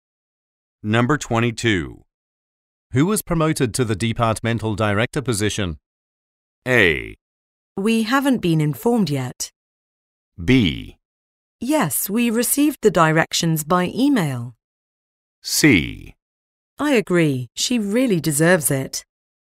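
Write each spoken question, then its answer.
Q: Who was promoted to the departmental director position?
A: A: We haven't been informed yet.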